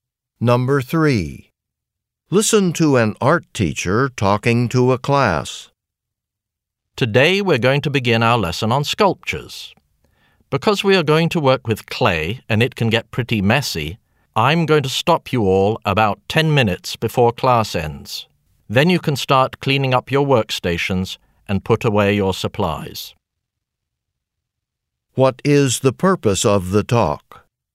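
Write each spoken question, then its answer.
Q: What is the purpose of the talk?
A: To explain that class will stop early for cleanup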